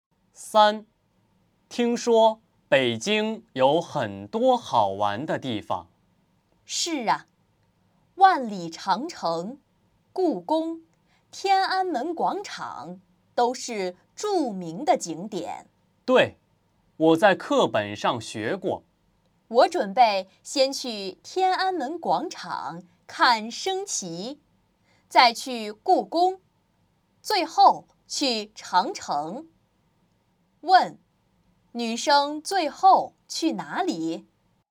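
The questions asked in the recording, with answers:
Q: 女生最后去哪里?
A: 长城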